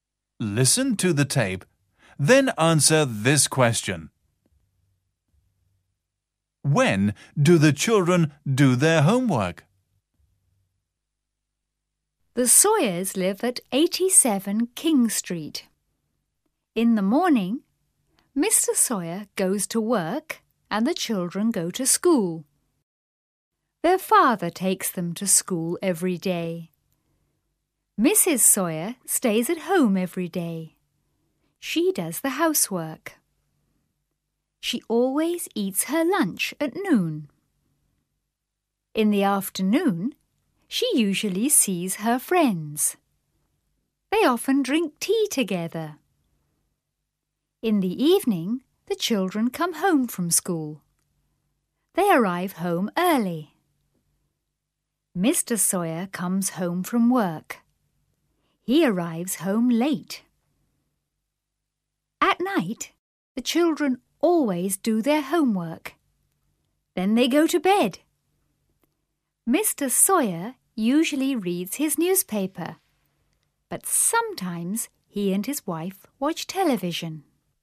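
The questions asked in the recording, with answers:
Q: When do the children do their homework?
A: At night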